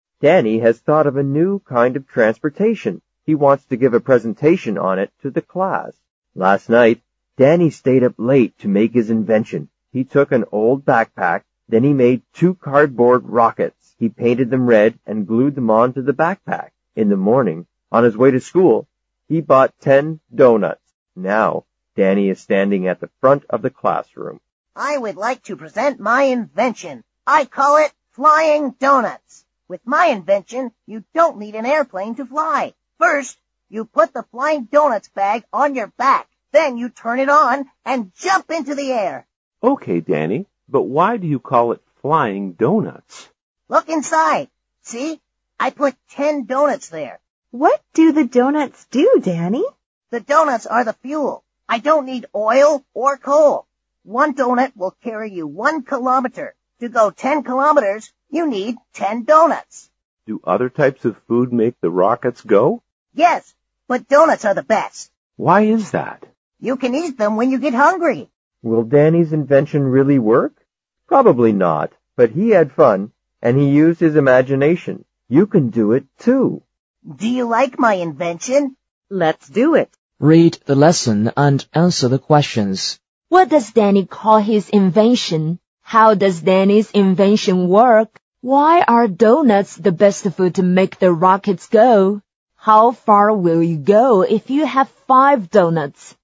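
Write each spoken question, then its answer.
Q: What does Danny call his invention?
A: Flying Donuts

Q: How does Danny's invention work?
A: You put the bag on your back, turn it on and jump into the air; donuts are the fuel

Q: Why are donuts the best food to make the rockets go?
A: You can eat them when you get hungry

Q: How far will you go if you have 5 donuts?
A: 5 kilometers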